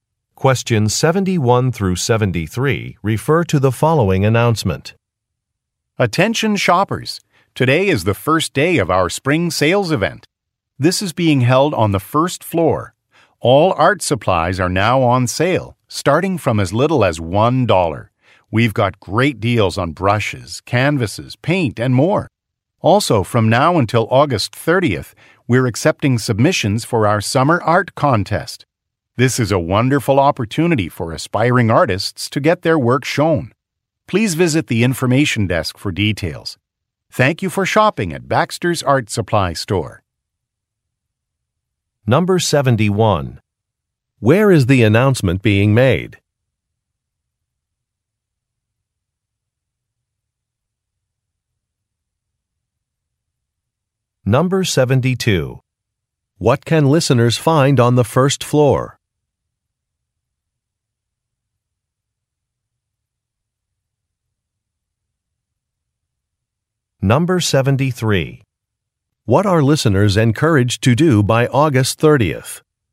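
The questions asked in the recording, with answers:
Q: Where is the announcement being made?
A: At Baxter's Art Supply Store

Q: What can listeners find on the first floor?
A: A spring sale on art supplies

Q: What are listeners encouraged to do by August 30th?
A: Submit work to the summer art contest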